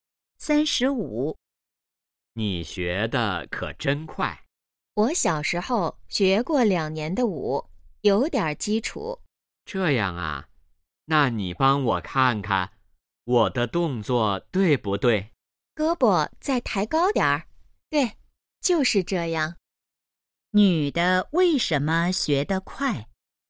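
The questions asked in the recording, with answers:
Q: 女的为什么学得快?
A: 小时候学过两年舞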